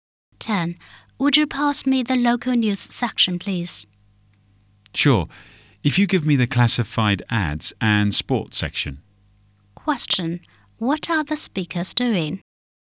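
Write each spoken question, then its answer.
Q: What are the speakers doing?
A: Reading a newspaper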